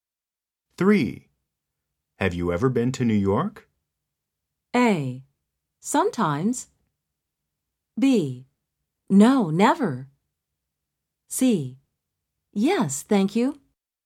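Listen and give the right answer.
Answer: B: No, never.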